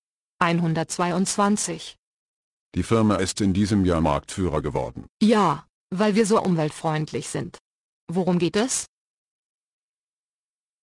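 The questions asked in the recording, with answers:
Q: Worum geht es?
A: Die Firma ist dieses Jahr Marktführer geworden, weil sie umweltfreundlich ist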